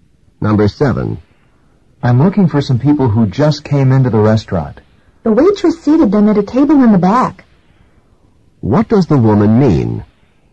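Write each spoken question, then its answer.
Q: What does the woman mean?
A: The people are seated at a table in the back.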